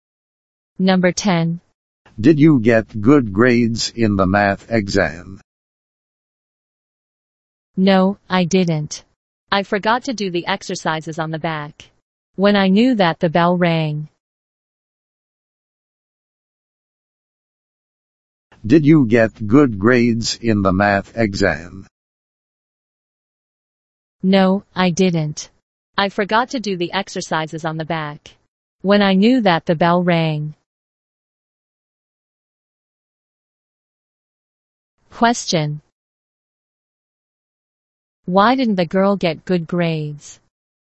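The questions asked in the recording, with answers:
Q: Why didn't the girl get good grades?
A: She forgot to do the exercises on the back.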